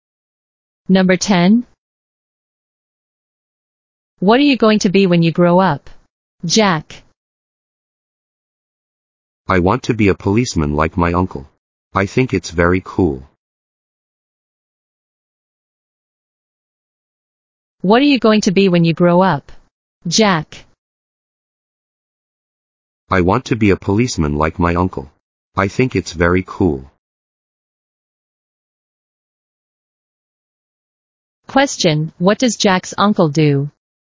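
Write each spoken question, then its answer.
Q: Question, what does Jack's uncle do?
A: He is a policeman.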